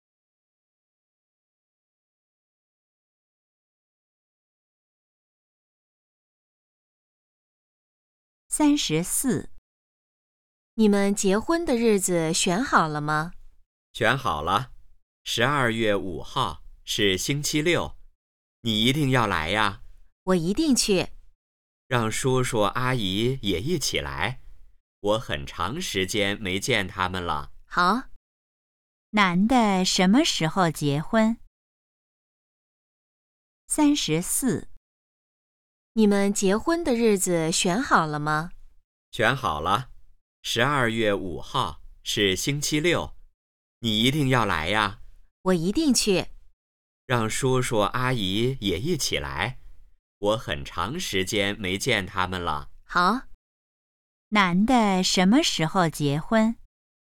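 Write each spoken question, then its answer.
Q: 男的什么时候结婚?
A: 12月5号(星期六)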